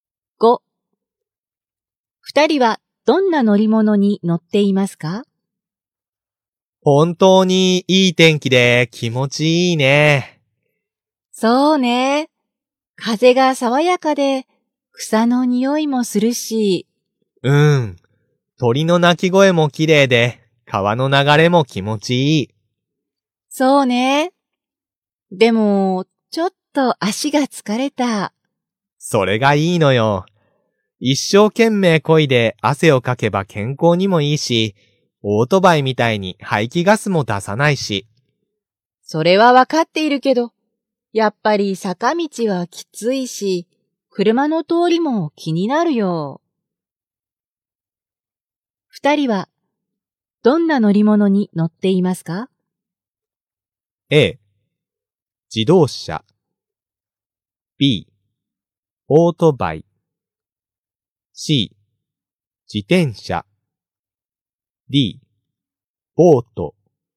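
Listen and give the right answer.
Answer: C: 自転車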